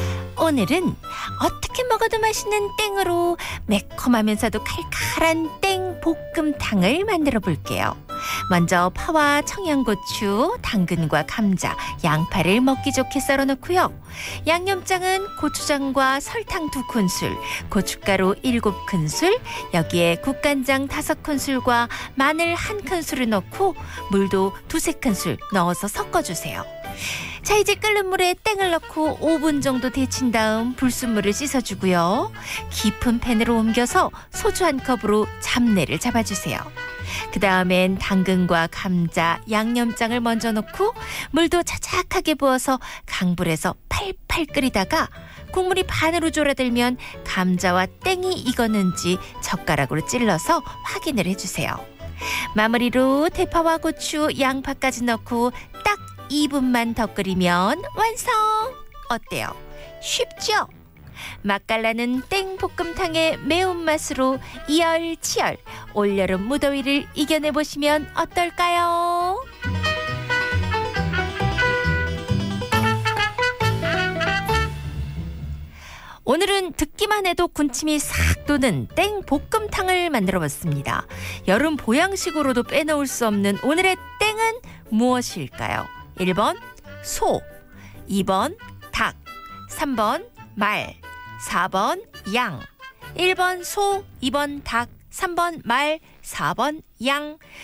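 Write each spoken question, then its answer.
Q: 여름 보양식으로도 빼놓을 수 없는 오늘의 땡은 무엇일까요?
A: 2: 닭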